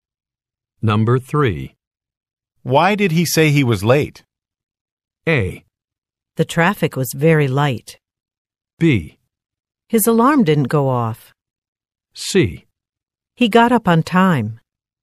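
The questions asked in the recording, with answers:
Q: Why did he say he was late?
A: B: His alarm didn't go off.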